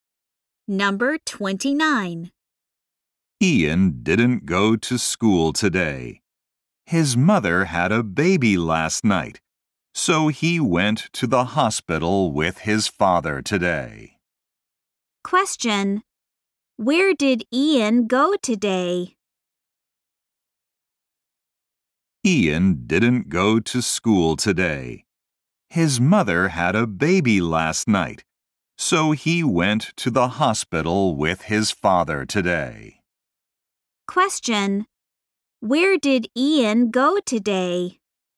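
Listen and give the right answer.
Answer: To the hospital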